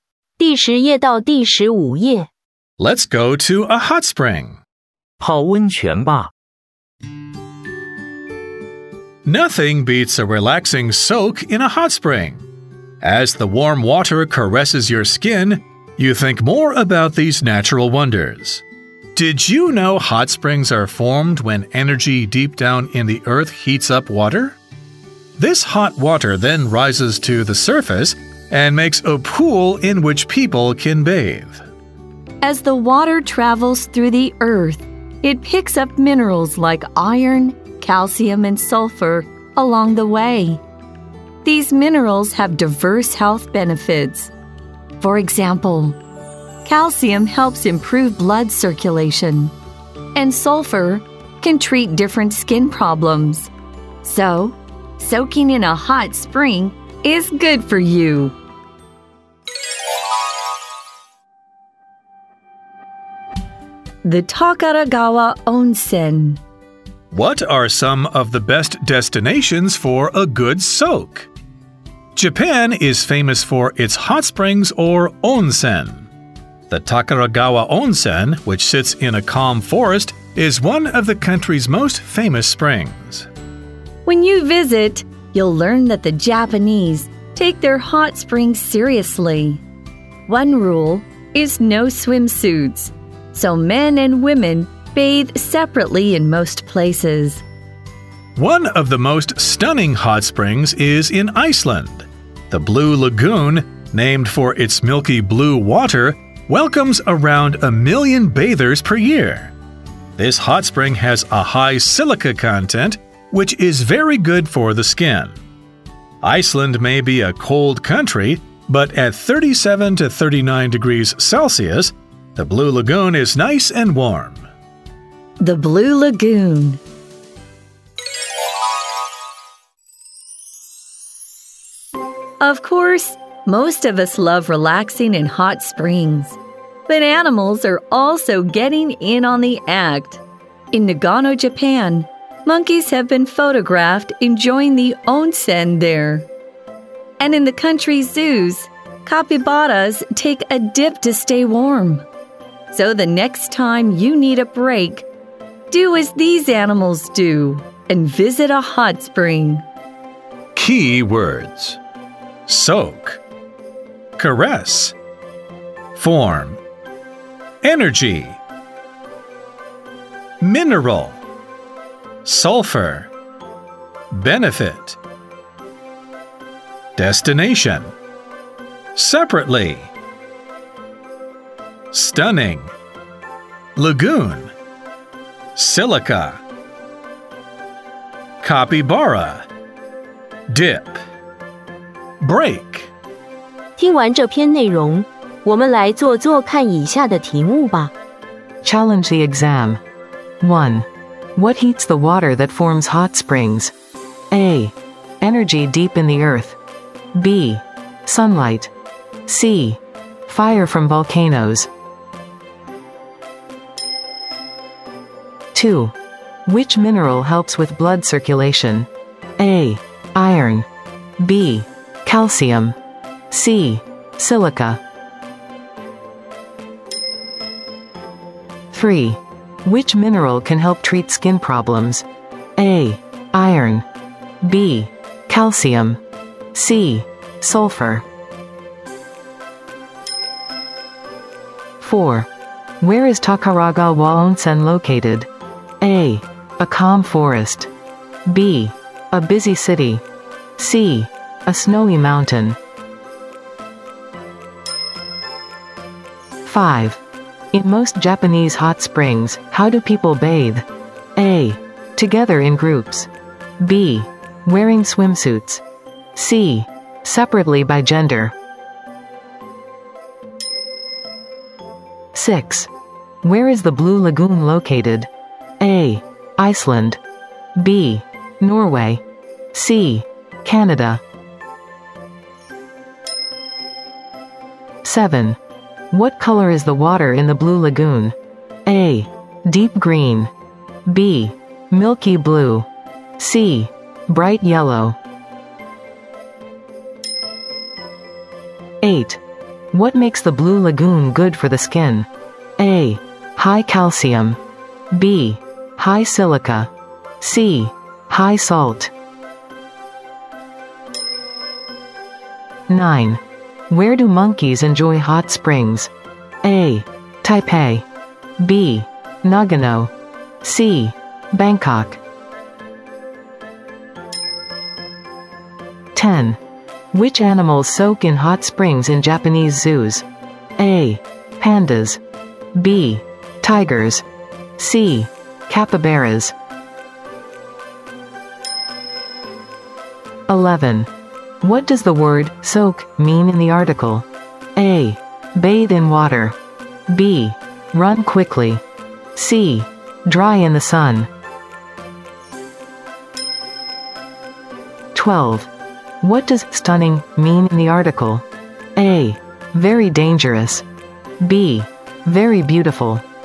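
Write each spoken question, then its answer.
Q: What heats the water that forms hot springs?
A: A: Energy deep in the earth.

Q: Which mineral helps with blood circulation?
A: B: Calcium.

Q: Which mineral can help treat skin problems?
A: C: Sulfur.

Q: Where is Takaraga Waonsen located?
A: A: A calm forest.

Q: In most Japanese hot springs, how do people bathe?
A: C: Separately by gender.

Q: Where is the Blue Lagoon located?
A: A: Iceland.

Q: What color is the water in the Blue Lagoon?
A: B: Milky blue.

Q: What makes the Blue Lagoon good for the skin?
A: B: High silica.

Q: Where do monkeys enjoy hot springs?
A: B: Nagano.

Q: Which animals soak in hot springs in Japanese zoos?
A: C: Capybaras.

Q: What does the word soak mean in the article?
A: A: Bathe in water.

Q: What does stunning mean in the article?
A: B: Very beautiful.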